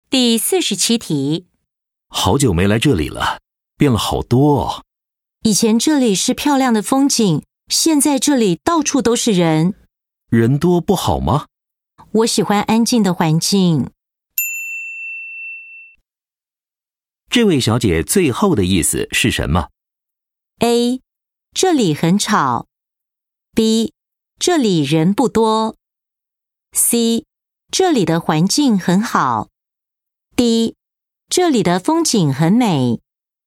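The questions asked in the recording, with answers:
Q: 这位小姐最后的意思是什么?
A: A: 这里很吵。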